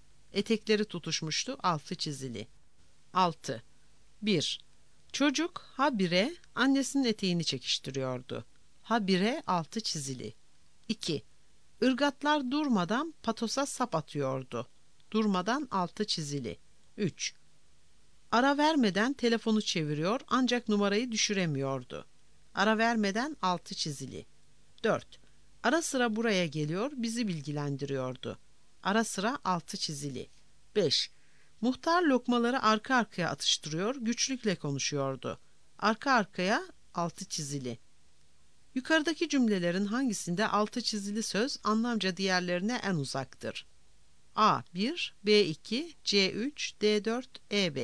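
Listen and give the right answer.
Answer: D: 4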